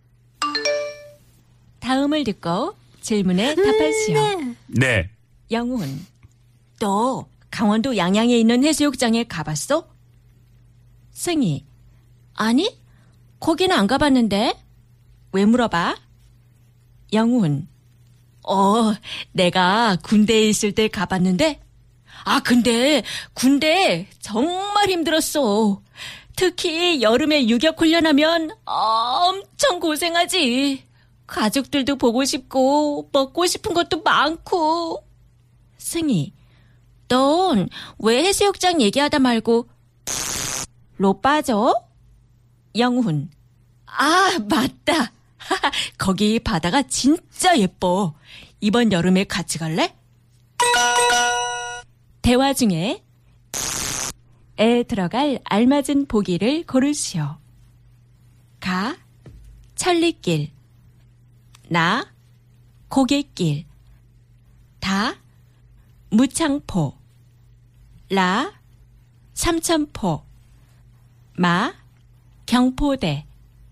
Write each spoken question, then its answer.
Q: 대화 중에 에 들어갈 알맞은 보기를 고르시오.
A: La.